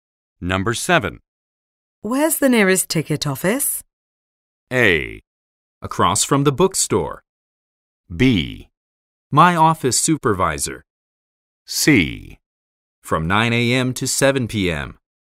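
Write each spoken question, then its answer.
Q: Where's the nearest ticket office?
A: A: Across from the bookstore.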